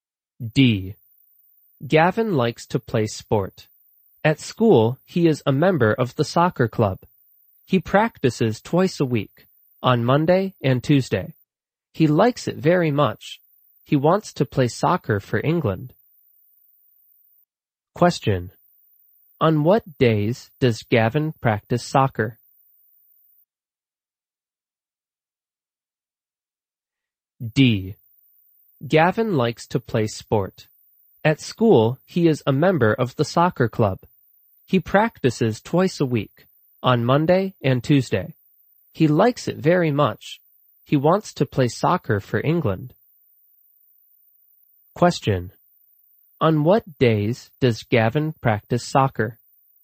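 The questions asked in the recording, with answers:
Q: On what days does Gavin practice soccer?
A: Monday and Tuesday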